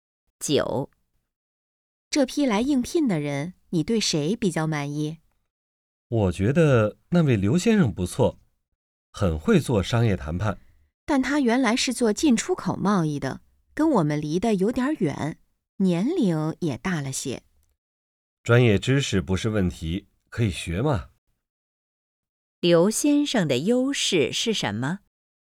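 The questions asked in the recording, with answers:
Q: 刘先生的优势是什么?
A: 很会做商业谈判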